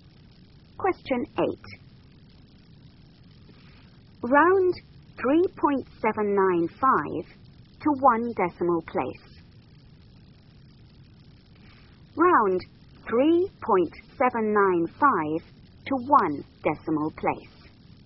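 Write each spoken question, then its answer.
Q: Round 3.795 to one decimal place.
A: 3.8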